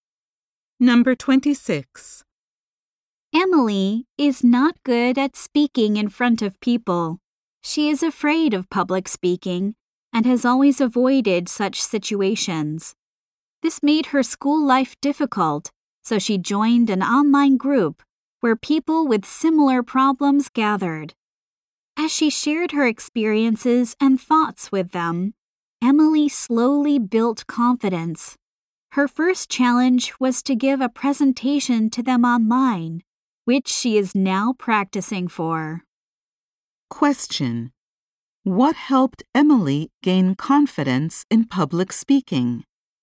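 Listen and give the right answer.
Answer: Sharing experiences in an online group with similar problems.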